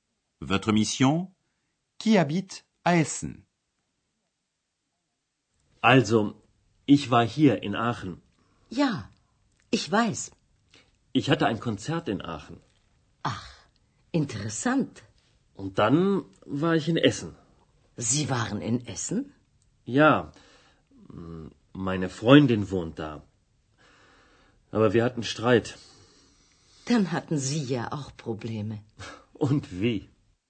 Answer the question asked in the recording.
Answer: C'est la petite amie de M. Mayer qui habite à Essen.